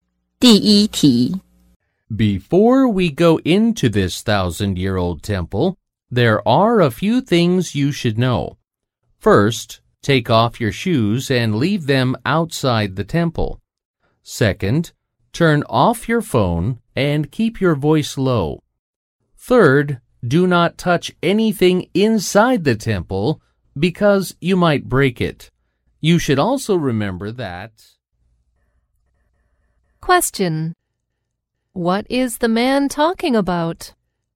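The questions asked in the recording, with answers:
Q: What is the man talking about?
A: The rules to follow when visiting the temple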